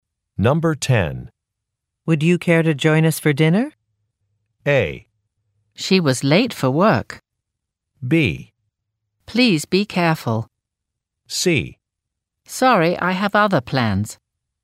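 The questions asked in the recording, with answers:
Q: Would you care to join us for dinner?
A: C: Sorry, I have other plans.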